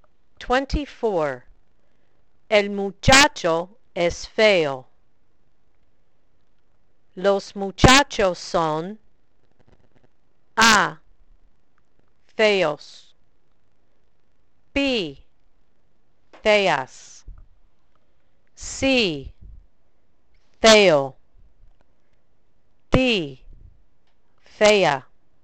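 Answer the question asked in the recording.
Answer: A: feos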